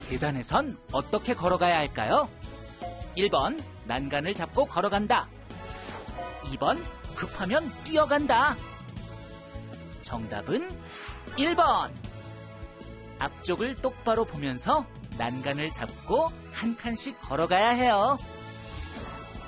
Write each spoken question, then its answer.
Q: 계단에선 어떻게 걸어가야 할까요?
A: 정답은 1번.